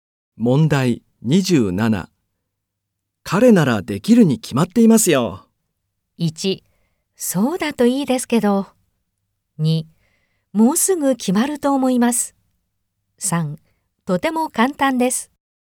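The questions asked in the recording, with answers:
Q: 彼ならできるに決まっていますよ。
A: 2: そうだといいですけど。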